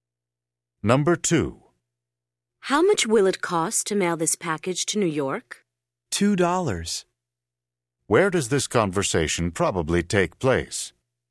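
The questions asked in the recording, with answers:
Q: Where does this conversation probably take place?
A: At a post office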